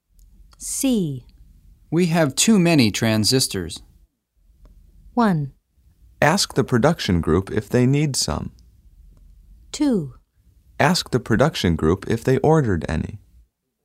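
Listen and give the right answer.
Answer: 1: Ask the production group if they need some.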